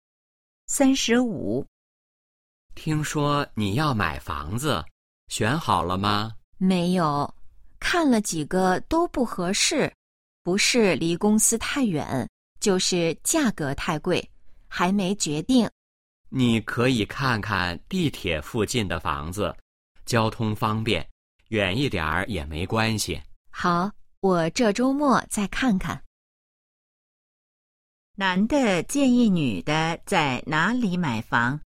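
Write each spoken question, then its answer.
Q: 男的建议女的在哪里买房?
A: 地铁附近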